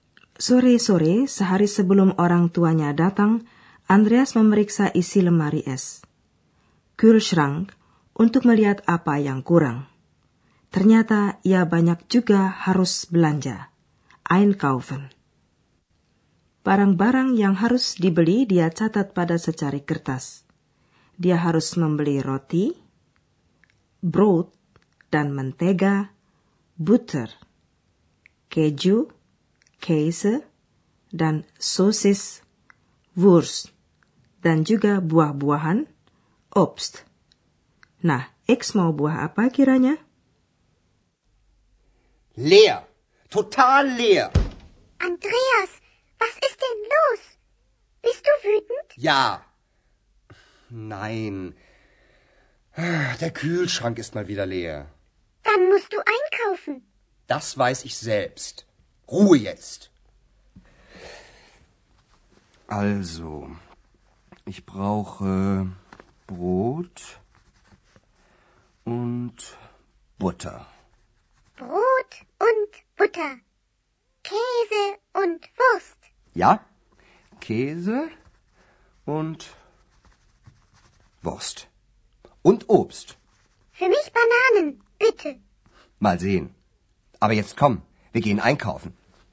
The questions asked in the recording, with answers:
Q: Nah, X mau buah apa kiranya?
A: Ekstrnjata Maupisang.